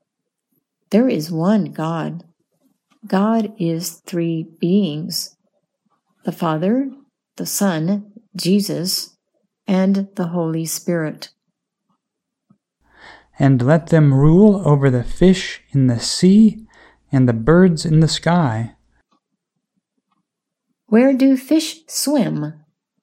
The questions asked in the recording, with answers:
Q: Where do fish swim?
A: Fish swim in the sea.